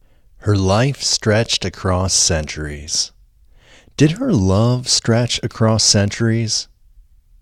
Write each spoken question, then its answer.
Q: Did her love stretch across centuries?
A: No, her love didn't stretch across centuries.